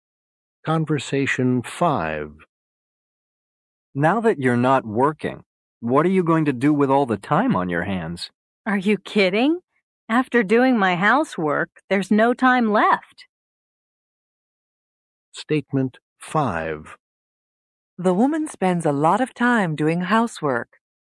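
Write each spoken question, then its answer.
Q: The woman spends a lot of time doing housework.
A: True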